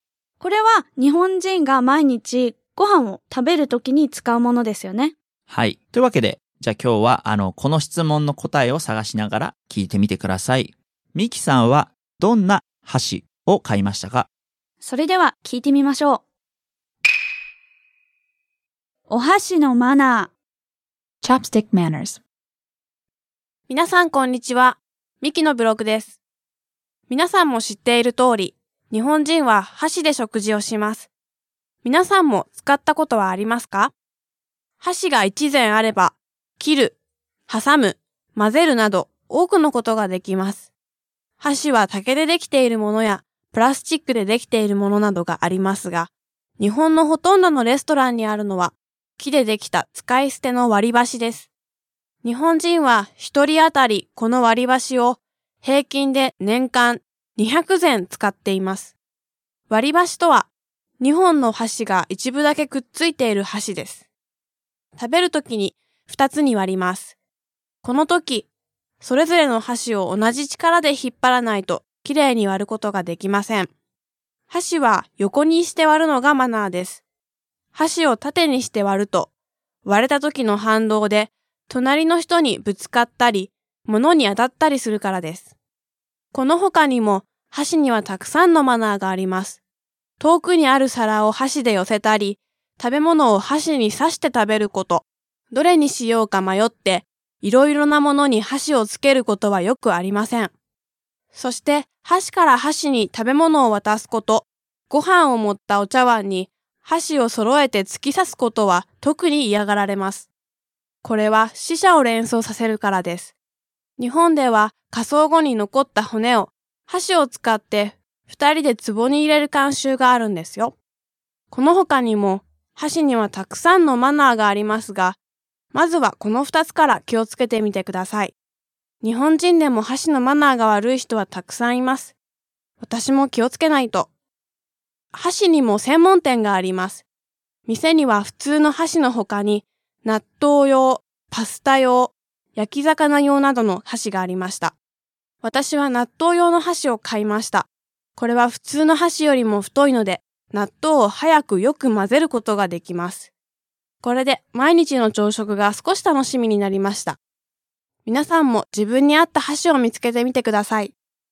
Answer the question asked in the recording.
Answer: 納豆用の箸を買いました。